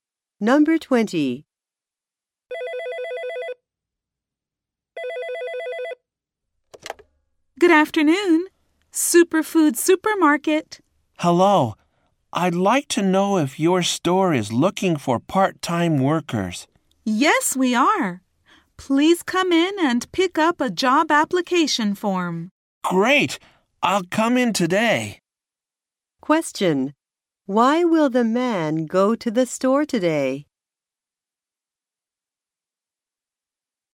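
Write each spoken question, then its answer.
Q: Why will the man go to the store today?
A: To pick up a job application form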